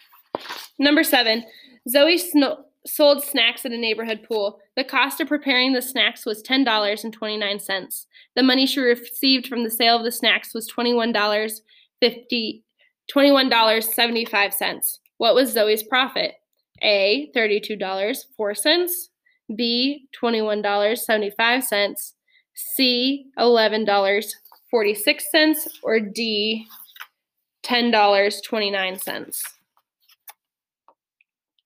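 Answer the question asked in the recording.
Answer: C: $11.46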